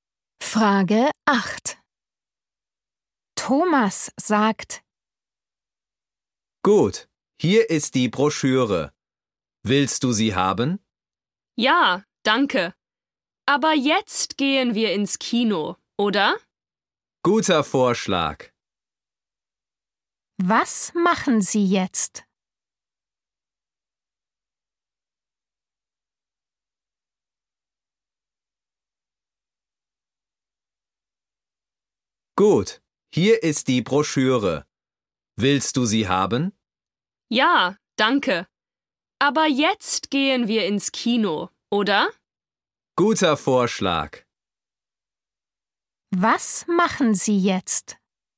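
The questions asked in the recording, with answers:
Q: Was machen Sie jetzt?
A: Sie gehen ins Kino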